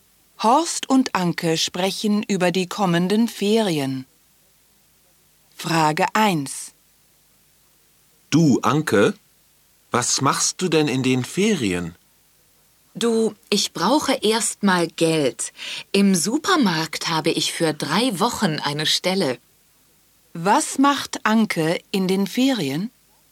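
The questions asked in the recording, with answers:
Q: Was macht Anke in den Ferien?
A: Sie arbeitet drei Wochen im Supermarkt.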